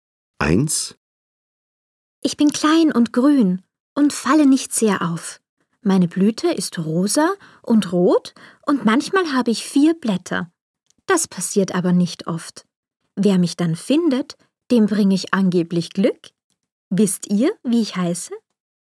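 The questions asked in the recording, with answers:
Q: Wisst ihr, wie ich heiße?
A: Klee (Kleeblatt)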